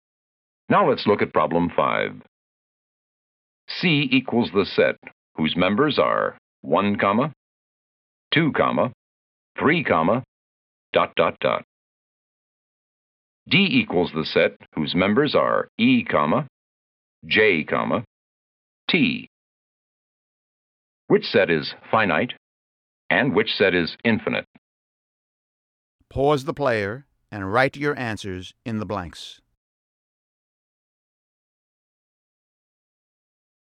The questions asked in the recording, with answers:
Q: Which set is finite and which set is infinite?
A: D is finite. Set D contained just three letters.